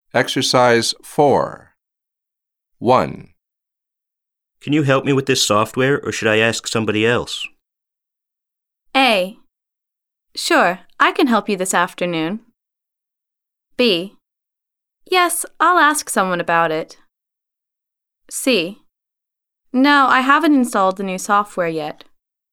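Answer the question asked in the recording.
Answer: A: Sure, I can help you this afternoon.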